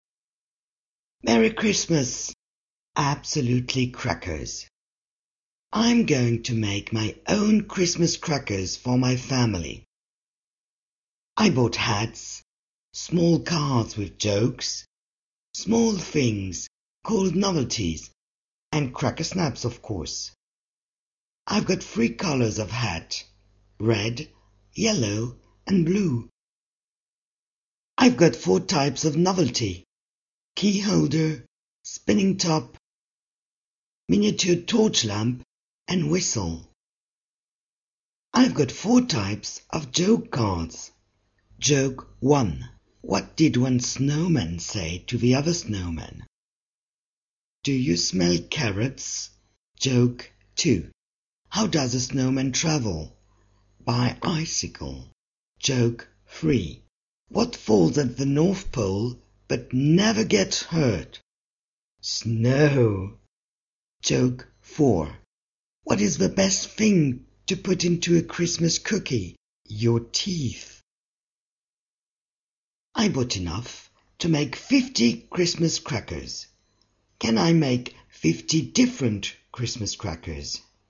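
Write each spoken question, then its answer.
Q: Can I make 50 different Christmas crackers?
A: No, only 3 × 4 × 4 = 48 different crackers are possible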